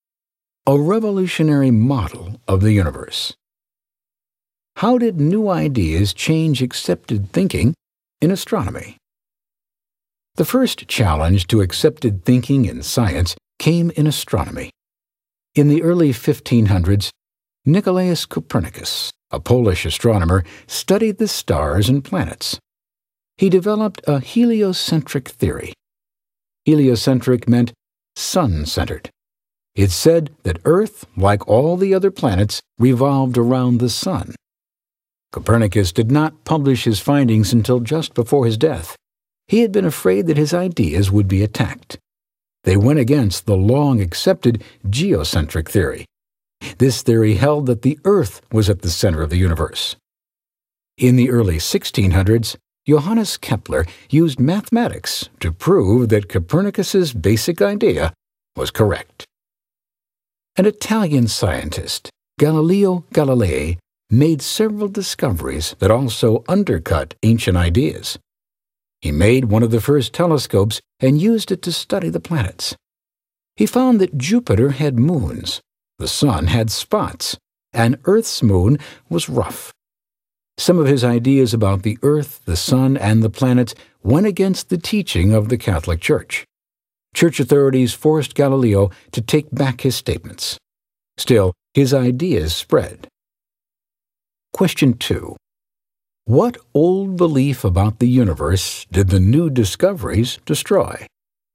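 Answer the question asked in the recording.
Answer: That the Earth was the center of the universe (geocentric theory)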